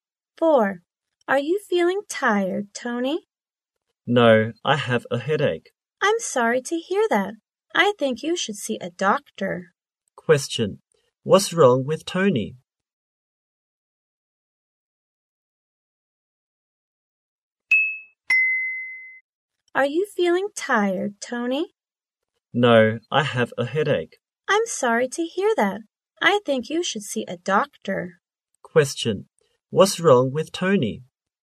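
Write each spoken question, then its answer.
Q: What's wrong with Tony?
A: He has a headache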